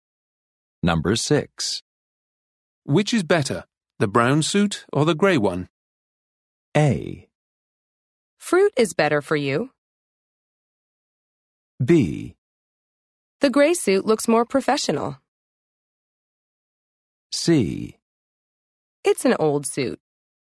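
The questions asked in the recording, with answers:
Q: Which is better, the brown suit or the grey one?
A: B: The grey suit looks more professional.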